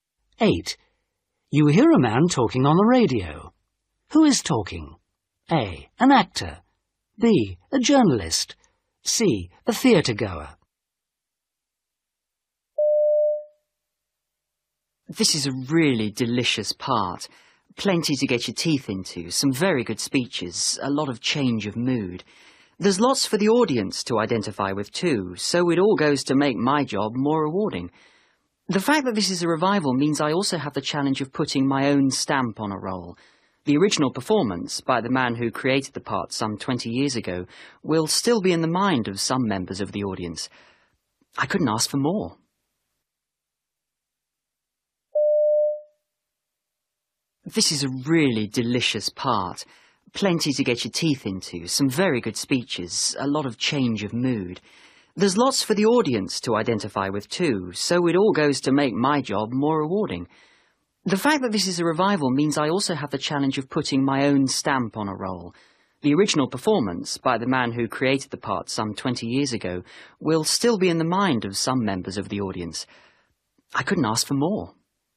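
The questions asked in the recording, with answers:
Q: Who is talking?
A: A: An actor.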